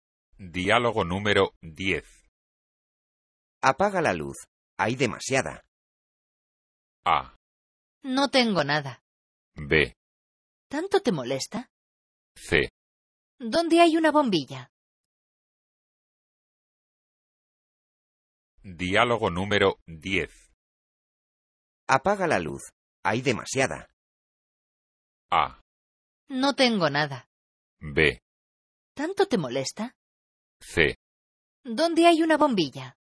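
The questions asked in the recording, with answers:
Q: Apaga la luz. Hay demasiada.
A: B: ¿Tanto te molesta?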